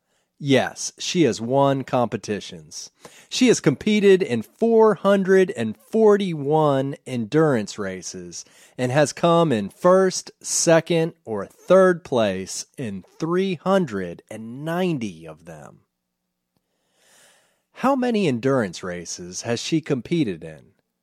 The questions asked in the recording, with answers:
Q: How many endurance races has she competed in?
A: She has competed in 441 endurance races.